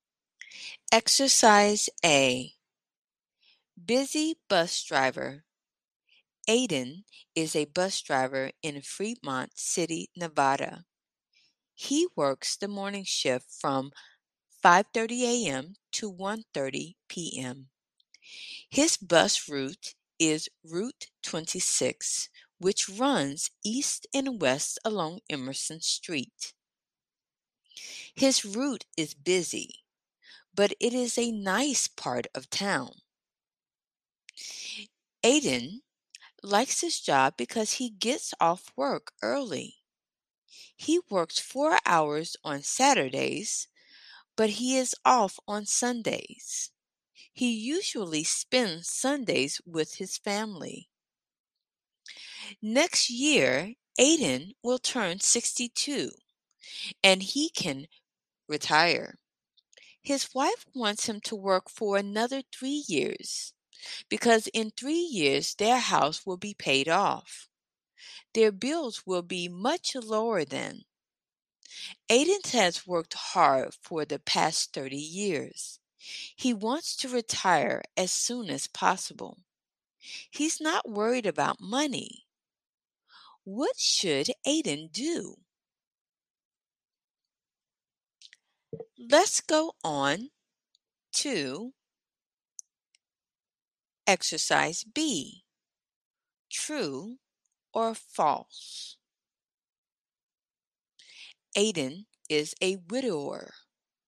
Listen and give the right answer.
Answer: False. Aiden is married.